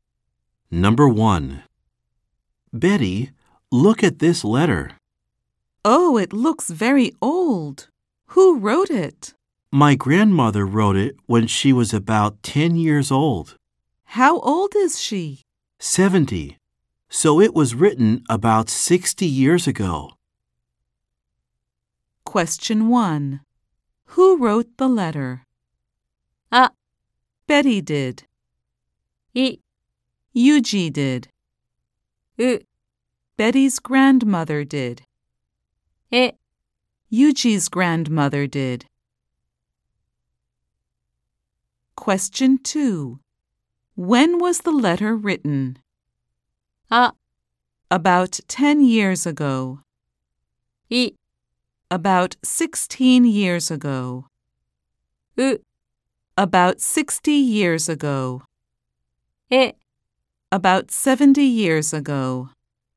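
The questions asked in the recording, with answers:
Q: When was the letter written?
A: う: About 60 years ago.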